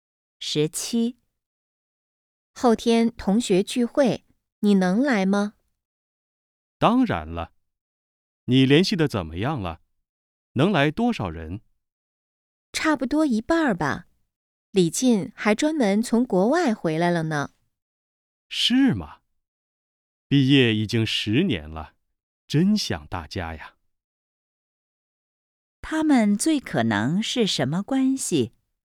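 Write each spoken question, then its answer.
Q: 他们最可能是什么关系?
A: 同学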